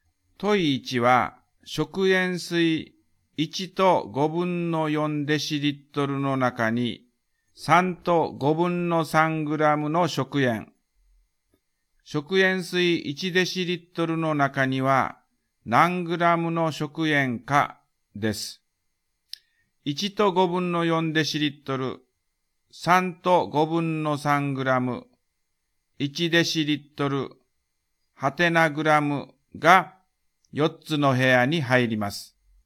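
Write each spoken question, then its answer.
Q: 問1は食塩水1と5分の4デシリットルの中に3と5分の3グラムの食塩。食塩水1デシリットルの中には何グラムの食塩かです。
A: 2グラム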